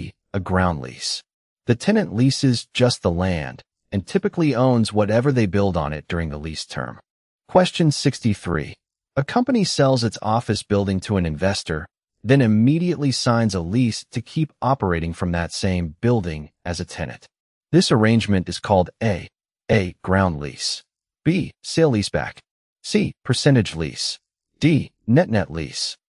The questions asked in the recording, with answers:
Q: This arrangement is called A.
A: The answer is B. A sale leaseback.